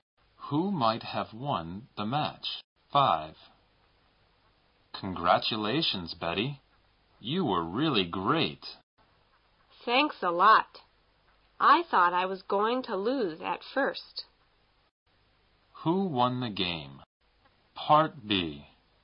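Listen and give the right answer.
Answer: Betty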